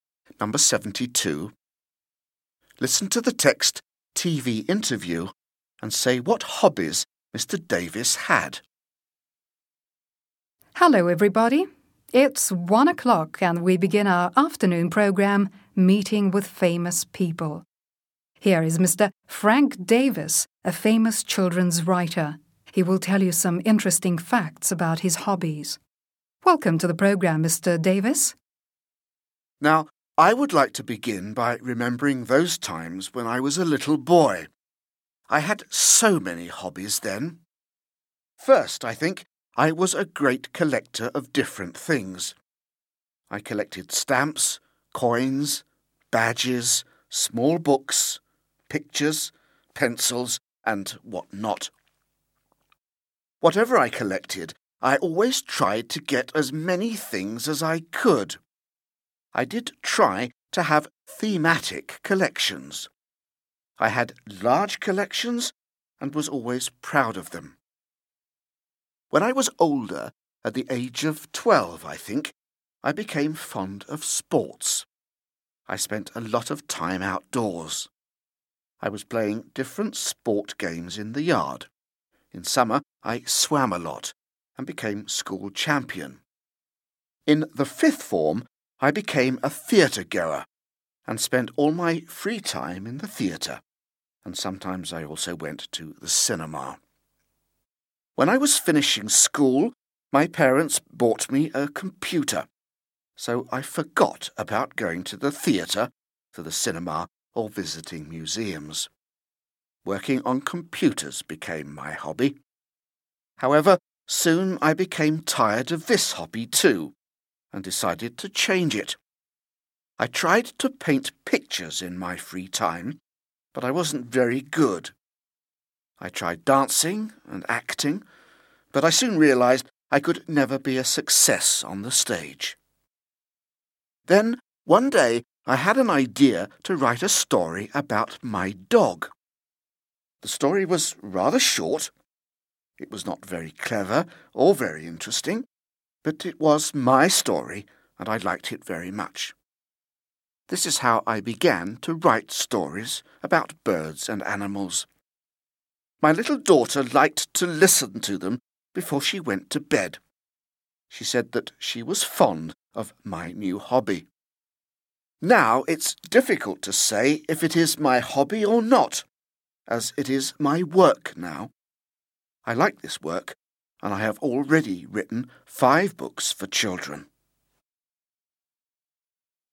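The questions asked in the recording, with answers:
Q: Listen to the text TV interview and say what hobbies Mr. Davis had.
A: Collecting things, sports and swimming, going to the theatre and cinema, computers, painting, dancing and acting, and writing stories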